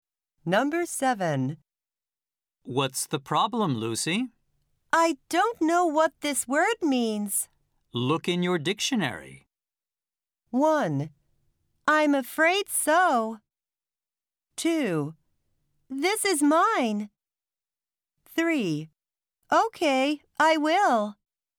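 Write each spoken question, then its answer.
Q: Look in your dictionary.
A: 3: Okay, I will.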